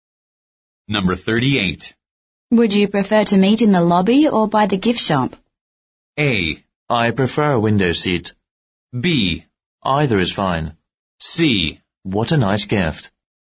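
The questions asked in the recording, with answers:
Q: Would you prefer to meet in the lobby or by the gift shop?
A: B: Either is fine.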